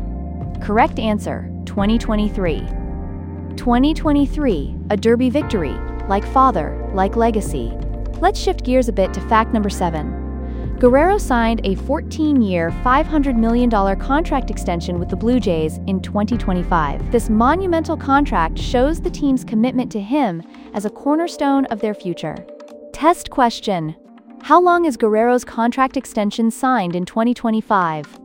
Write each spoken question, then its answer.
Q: How long is Guerrero's contract extension signed in 2025?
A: Correct answer, 14 years.